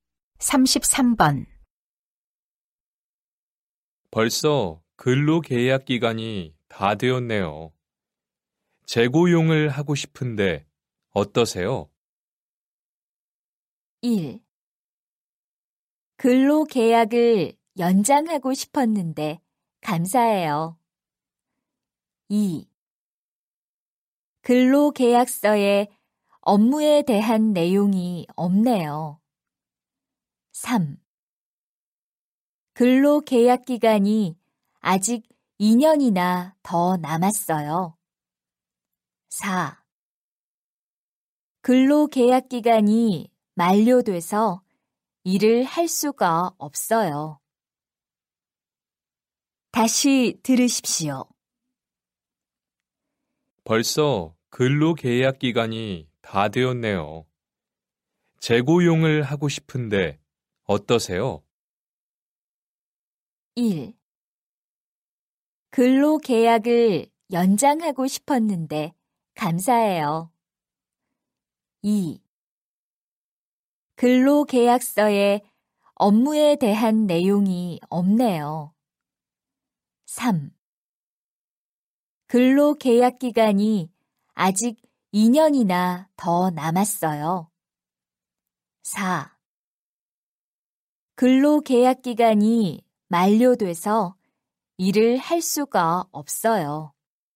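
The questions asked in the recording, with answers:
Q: 벌써 근로계약 기간이 다 되었네요. 재고용을 하고 싶은데 어떠세요?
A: 1: 근로계약을 연장하고 싶었는데 감사해요.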